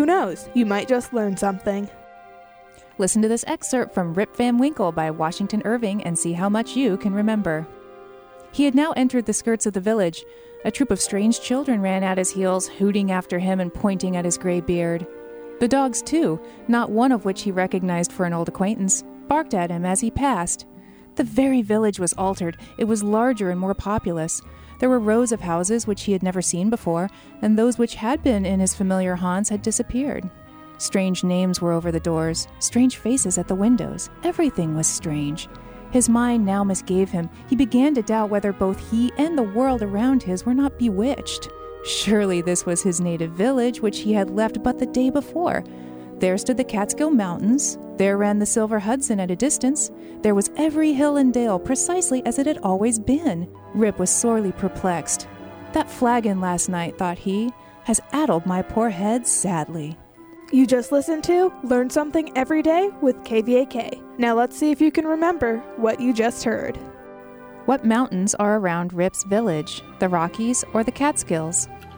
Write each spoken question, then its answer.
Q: What mountains are around Rip's village, the Rockies or the Catskills?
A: The Catskill Mountains.